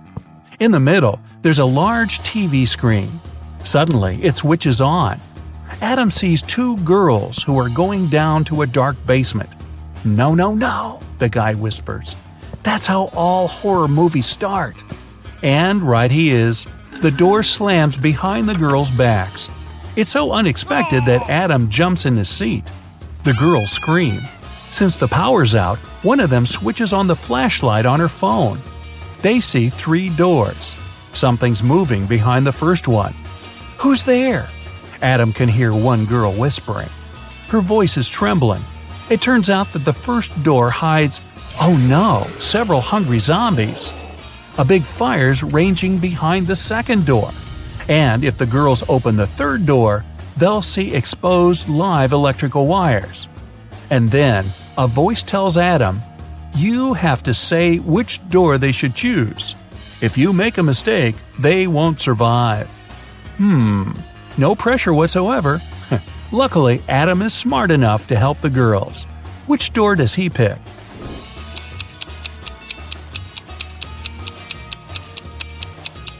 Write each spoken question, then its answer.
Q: Which door does he pick?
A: The third door.